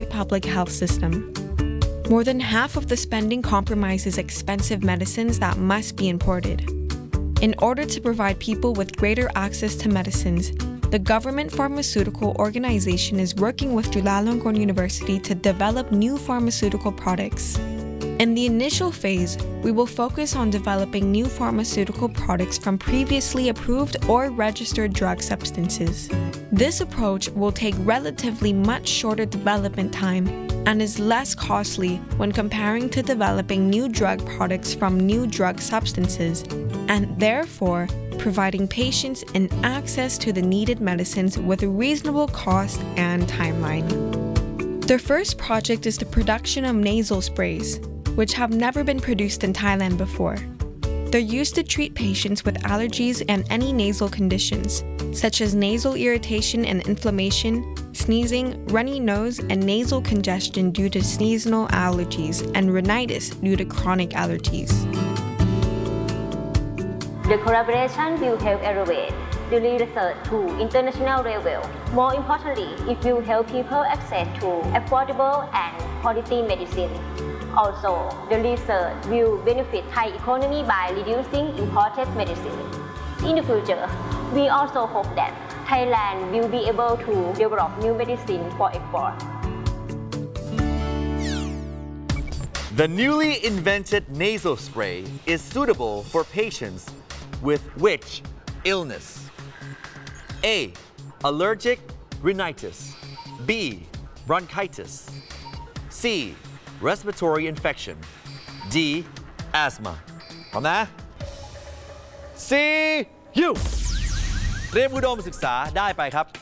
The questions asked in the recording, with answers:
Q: The newly invented nasal spray is suitable for patients with which illness?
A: The answer is A. Allergic rhinitis.